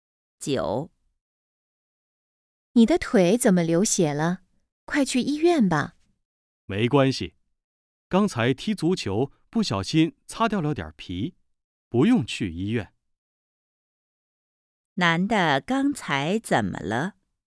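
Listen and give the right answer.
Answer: 踢足球时腿擦破了皮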